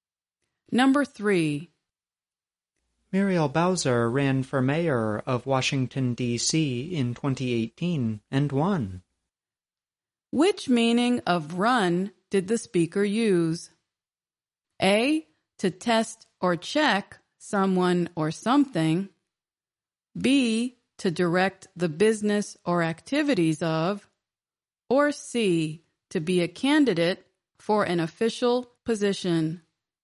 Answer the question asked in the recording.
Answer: The answer is C, to be a candidate for an official position.